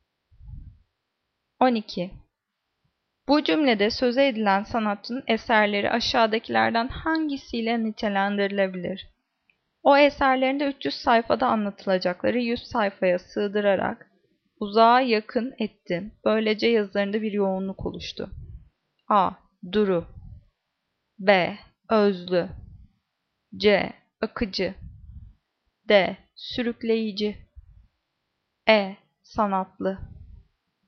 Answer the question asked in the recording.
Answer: Cevap B. Özlü.